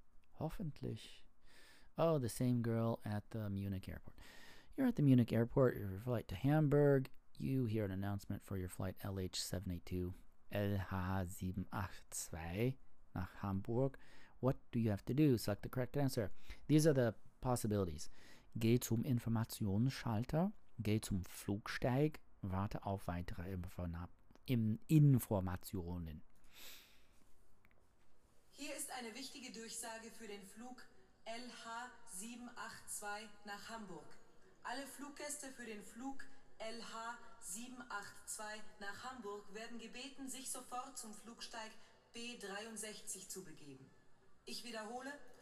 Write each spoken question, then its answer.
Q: What do you have to do? Select the correct answer.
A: Geh zum